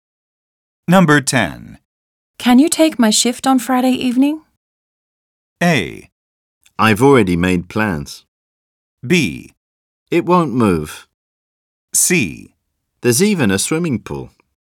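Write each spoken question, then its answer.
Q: Can you take my shift on Friday evening?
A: A: I've already made plans.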